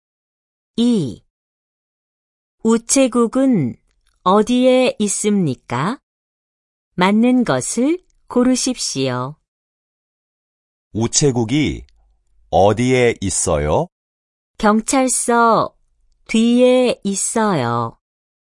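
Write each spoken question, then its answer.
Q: 우체국은 어디에 있습니까?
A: 경찰서 뒤에 있어요.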